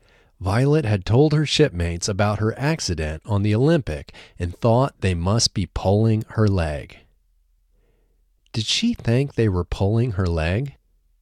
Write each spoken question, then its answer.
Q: Did she think they were pulling her leg?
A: Yes, she thought they were pulling her leg.